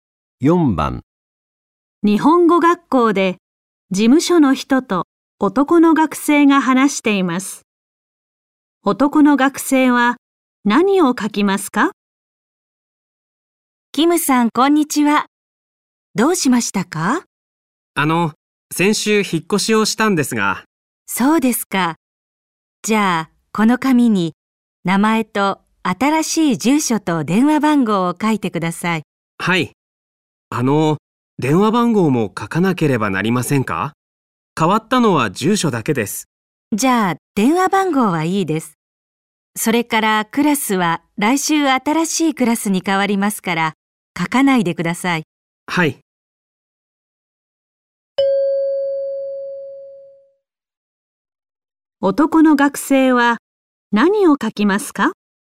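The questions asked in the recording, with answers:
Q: 男の学生は何を書きますか?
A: 名前と新しい住所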